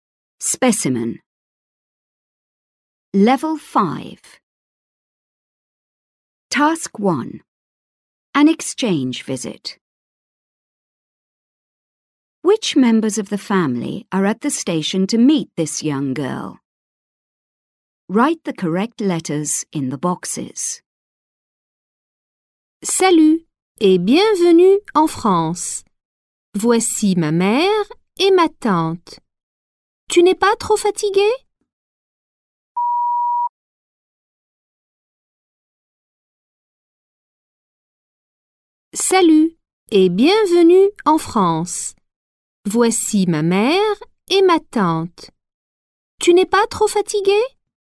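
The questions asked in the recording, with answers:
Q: Which members of the family are at the station to meet this young girl?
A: Her mother and her aunt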